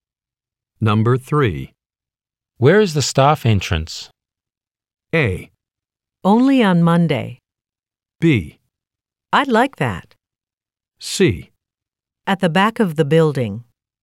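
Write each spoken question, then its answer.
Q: Where is the staff entrance?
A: C: At the back of the building.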